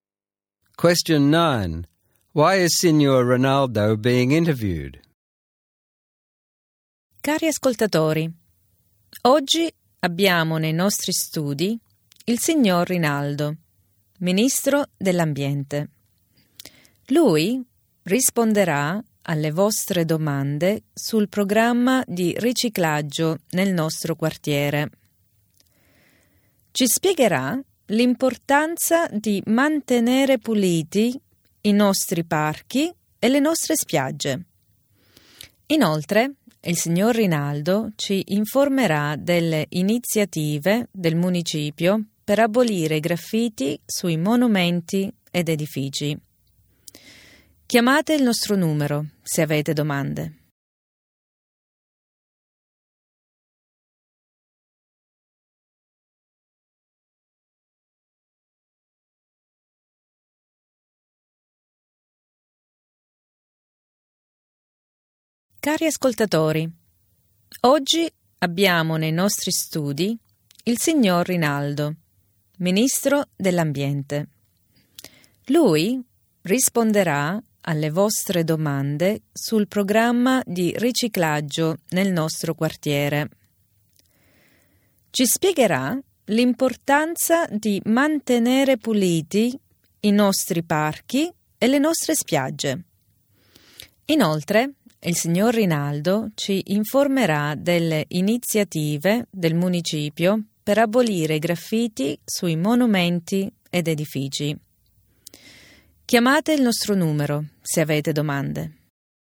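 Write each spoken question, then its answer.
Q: Why is Signor Rinaldo being interviewed?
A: He is the environment minister; he will answer questions about the local recycling program, explain why parks and beaches must be kept clean and talk about the council's plans to remove graffiti.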